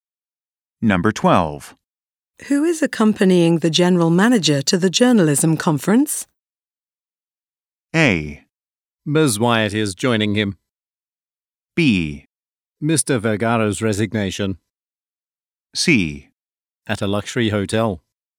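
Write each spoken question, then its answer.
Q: Who is accompanying the general manager to the journalism conference?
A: A: Ms. Wyatt is joining him.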